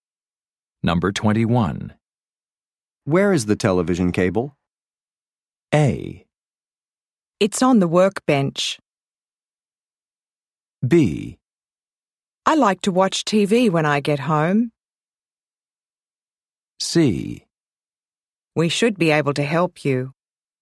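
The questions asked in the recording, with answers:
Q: Where is the television cable?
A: A: It's on the workbench.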